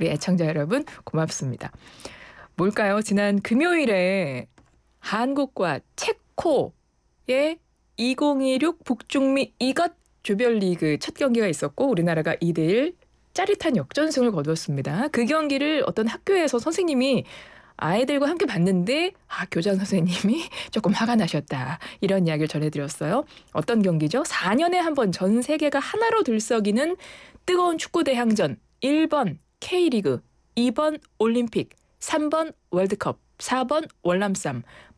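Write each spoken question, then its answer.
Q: 어떤 경기죠? 4년에 한번전 세계가 하나로 들썩이는 뜨거운 축구 대항전.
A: 3: 월드컵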